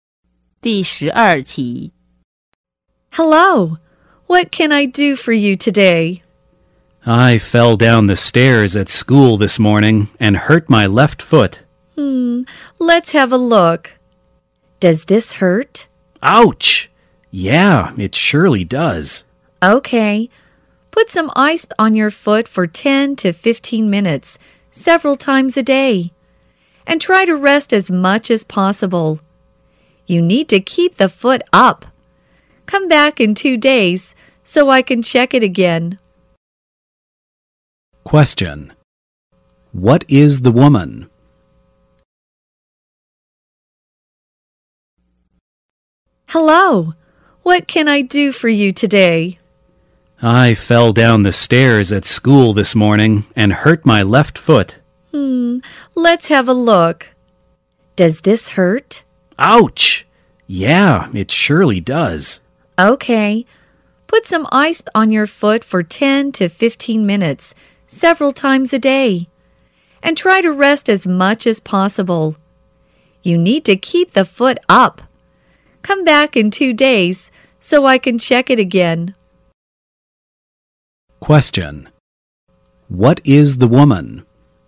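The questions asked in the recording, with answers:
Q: What is the woman?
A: A doctor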